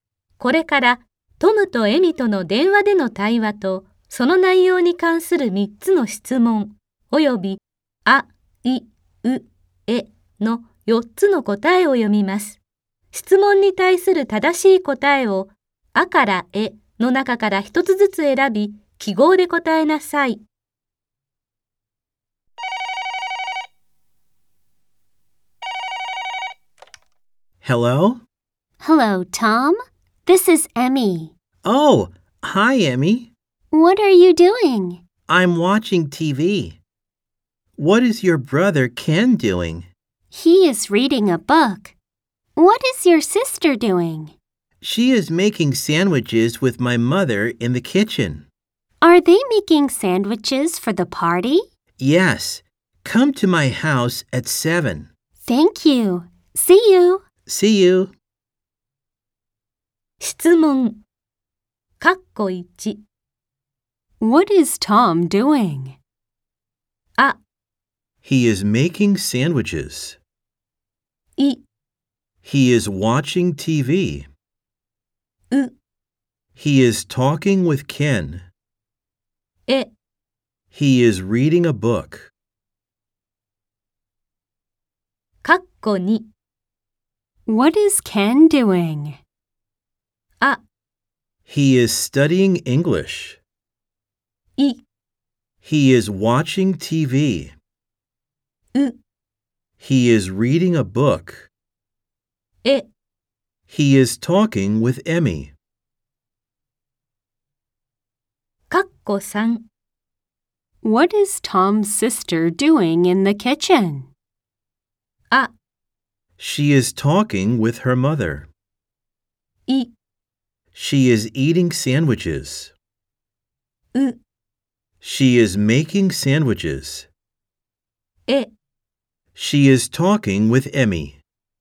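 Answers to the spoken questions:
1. い: He is watching TV.
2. う: He is reading a book.
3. う: She is making sandwiches.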